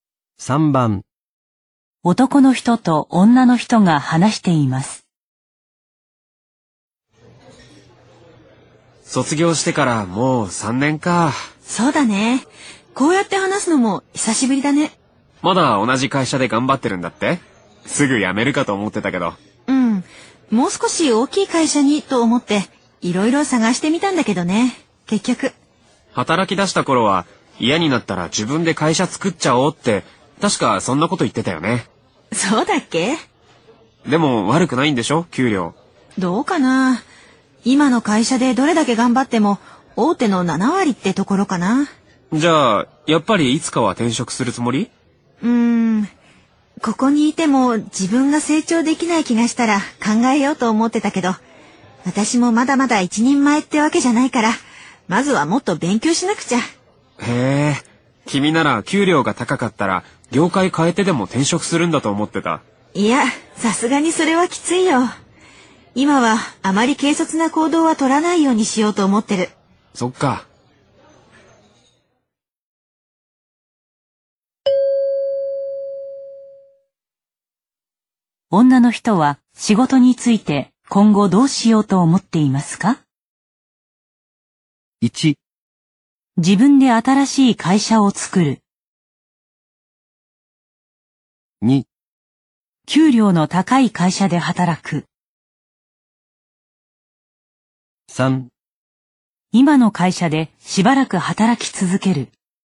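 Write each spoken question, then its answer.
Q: 女の人は仕事について今後どうしようと思っていますか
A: 3: 今の会社でしばらく働き続ける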